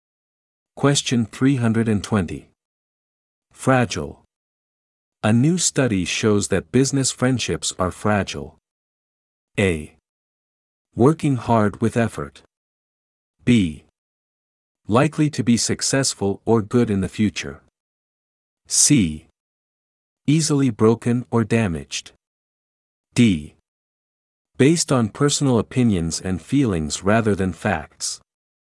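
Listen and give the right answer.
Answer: C: Easily broken or damaged.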